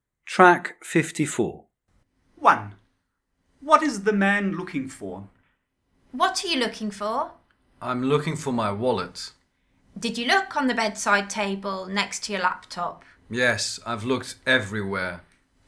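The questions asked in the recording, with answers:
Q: What is the man looking for?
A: His wallet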